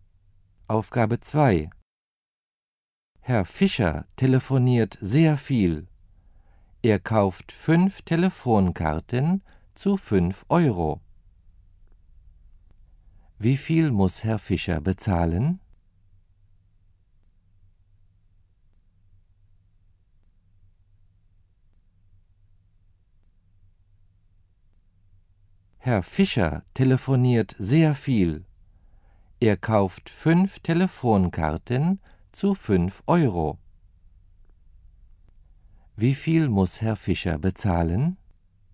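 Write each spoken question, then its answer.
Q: Wie viel muss Herr Fischer bezahlen?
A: 25 Euro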